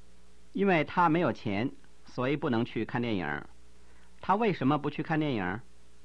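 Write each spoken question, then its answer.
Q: 他为什么不去看电影?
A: 因为他没有钱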